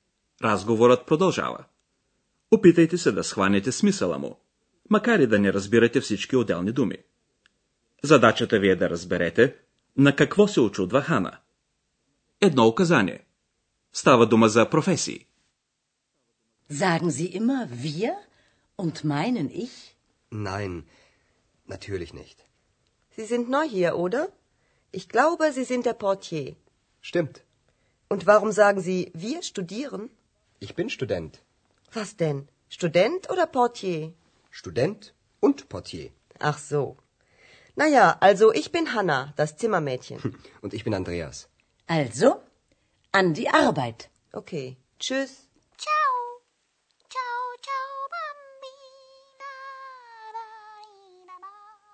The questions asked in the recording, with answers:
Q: Задачата ви е да разберете на какво се очудва Хана.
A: Hanna не може да разбере, защо Андреас казва, че е студент, след като преди това потвърди, че е портиер.